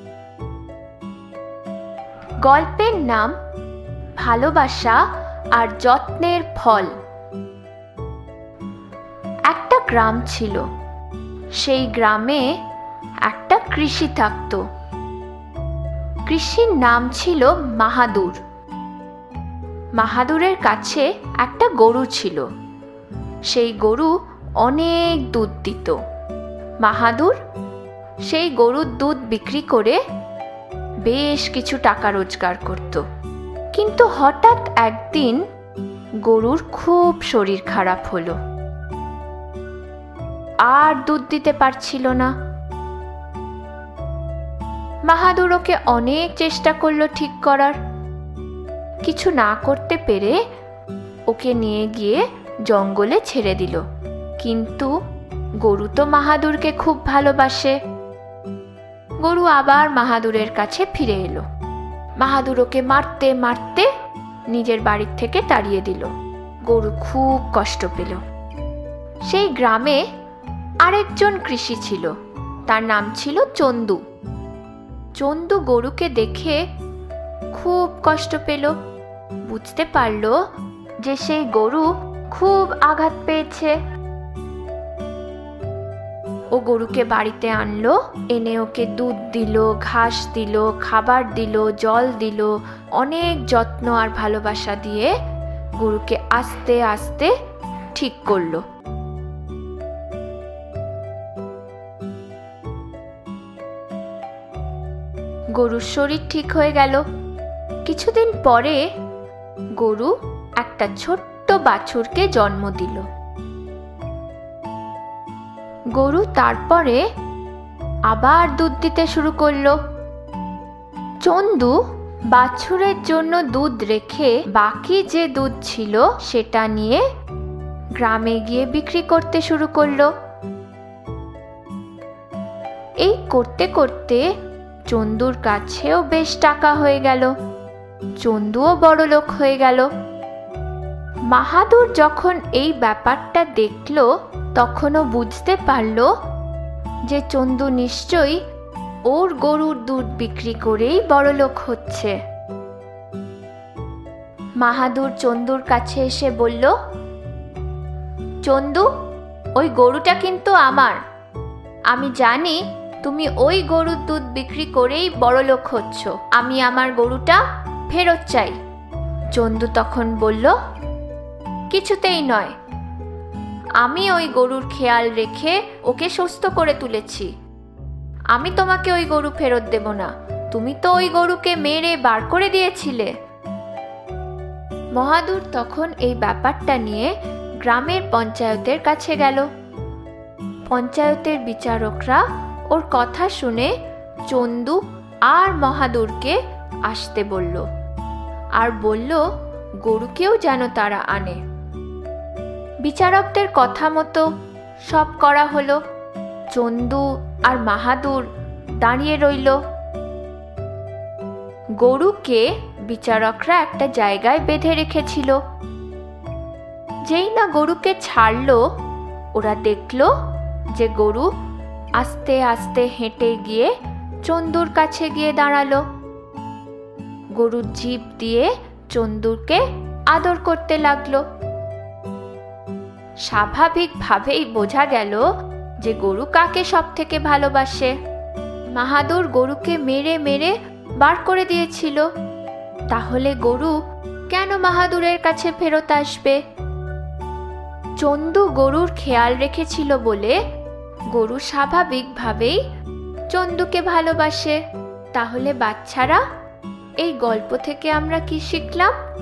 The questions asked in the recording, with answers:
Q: তাহলে বাচ্চারা, এই গল্প থেকে আমরা কি শিখলাম?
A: কাউকে যদি তোমরা যত্ন আর ভালোবাসা দাও, তোমরাও তার থেকে যত্ন আর ভালোবাসা ফেরত পাবে।